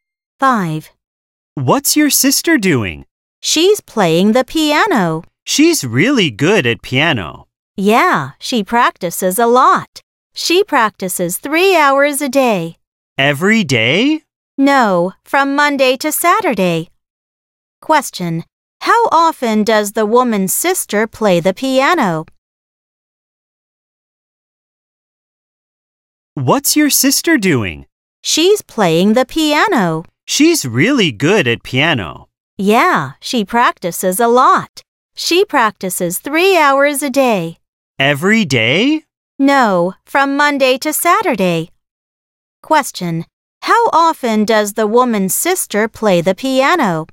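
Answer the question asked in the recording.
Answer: Six days a week, Monday to Saturday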